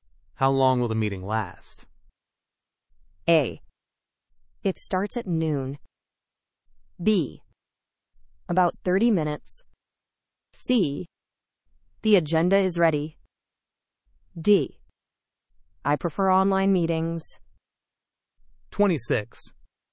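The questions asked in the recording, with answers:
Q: How long will the meeting last?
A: B: About 30 minutes.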